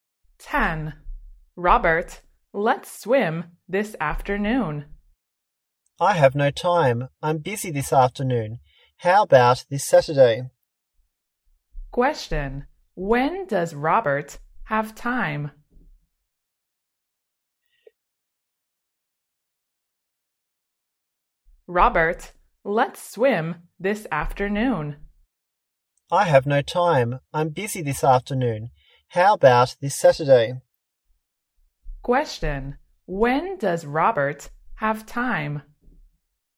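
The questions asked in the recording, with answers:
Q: when does Robert have time?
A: this Saturday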